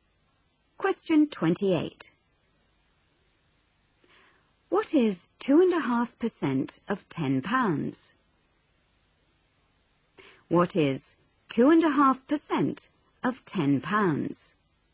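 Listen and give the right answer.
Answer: 25p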